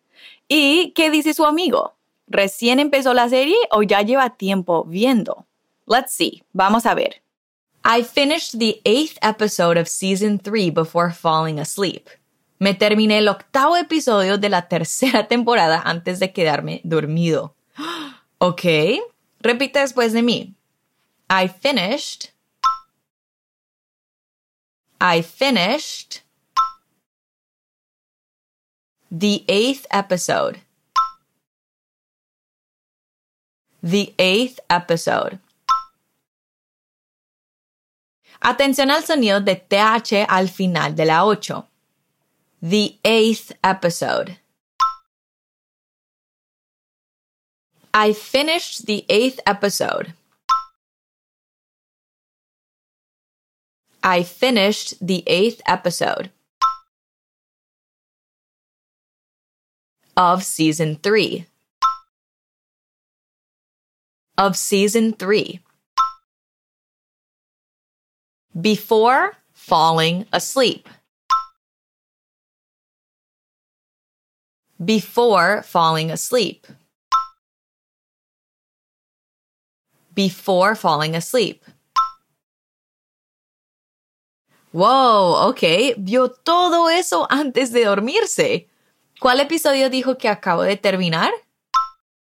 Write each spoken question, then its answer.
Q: ¿Cuál episodio dijo que acabo de terminar?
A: Yeah, episode 8, or the 8th episode, right.